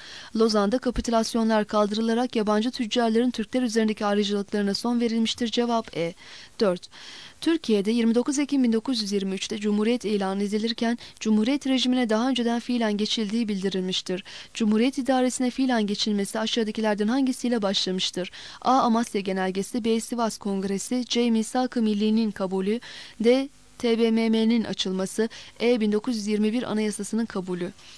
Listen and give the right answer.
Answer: Cevap D.